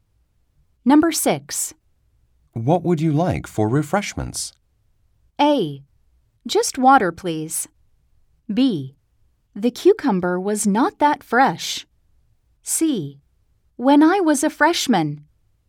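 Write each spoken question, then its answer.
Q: What would you like for refreshments?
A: A: Just water, please.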